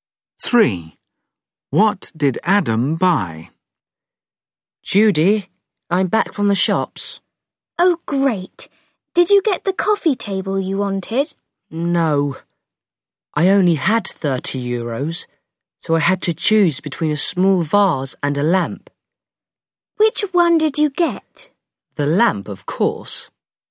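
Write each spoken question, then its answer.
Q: What did Adam buy?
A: a lamp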